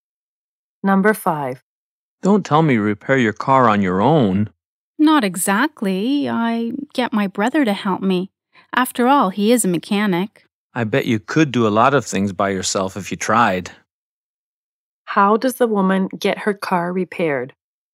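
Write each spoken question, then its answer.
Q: How does the woman get her car repaired?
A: She repairs it with help from her brother, a mechanic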